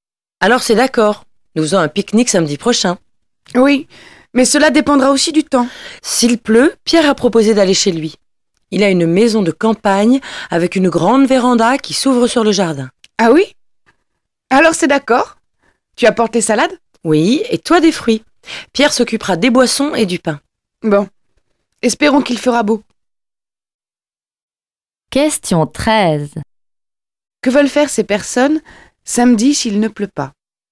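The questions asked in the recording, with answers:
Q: Que veulent faire ces personnes samedi s'il ne pleut pas?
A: Faire un pique-nique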